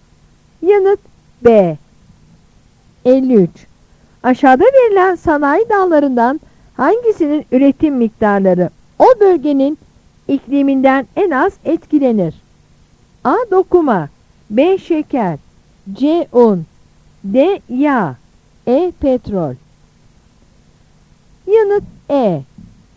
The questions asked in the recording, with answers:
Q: Aşağıda verilen sanayi dallarından hangisinin üretim miktarları o bölgenin ikliminden en az etkilenir?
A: Yanıt E.